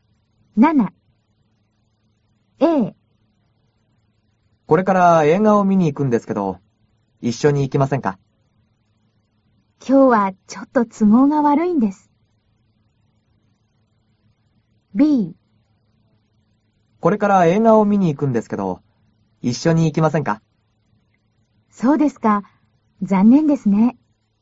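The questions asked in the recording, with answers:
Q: これから映画を見に行くんですけど、一緒に行きませんか?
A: A: 今日はちょっと都合が悪いんです。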